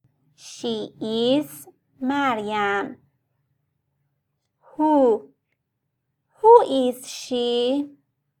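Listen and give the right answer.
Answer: Maryam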